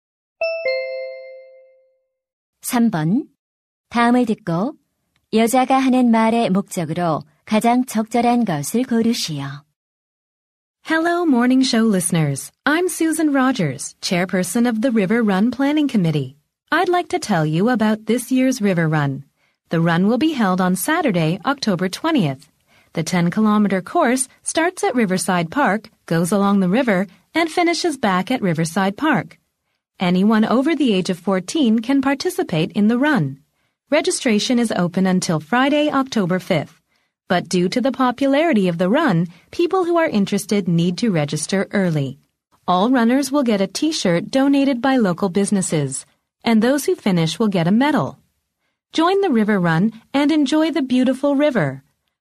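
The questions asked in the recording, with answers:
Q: 다음을 듣고 여자가 하는 말의 목적으로 가장 적절한 것을 고르시오.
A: River Run 행사 참가를 홍보하고 안내하려고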